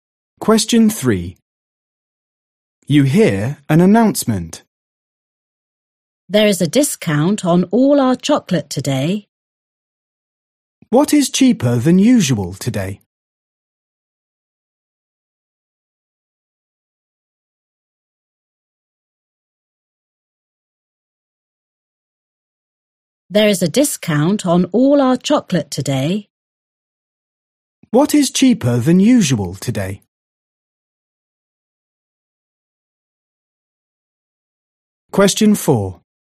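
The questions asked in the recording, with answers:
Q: What is cheaper than usual today?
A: chocolate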